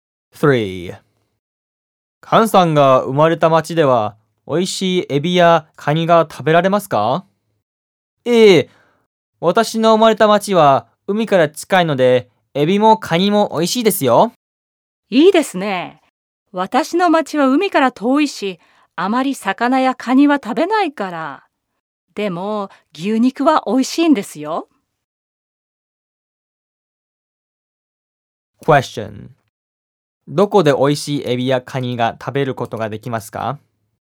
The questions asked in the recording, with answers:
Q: どこで美味しいエビやカニが食べることができますか?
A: カンさんが生まれた町で美味しいエビやカニが食べることができます。